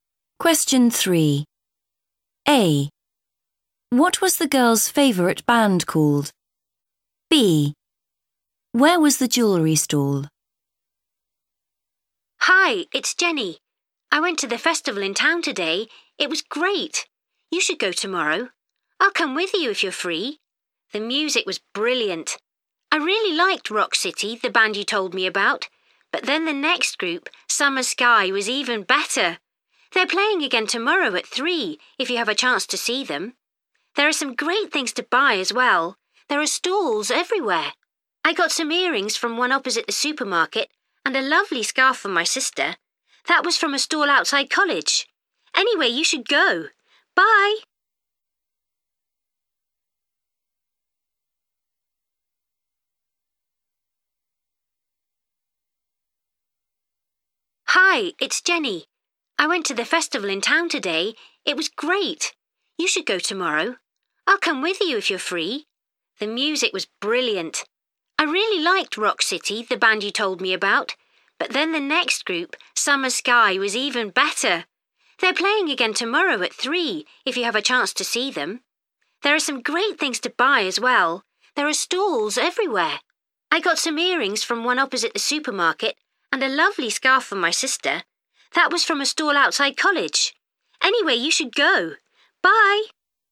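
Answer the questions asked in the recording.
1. Summer Sky
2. opposite the supermarket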